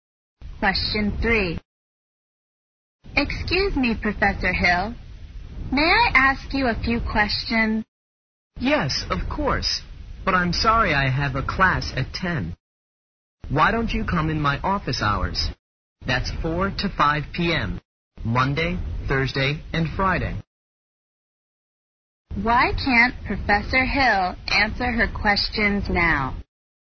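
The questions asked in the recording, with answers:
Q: Why can't Professor Hill answer her questions now?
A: He has a class at 10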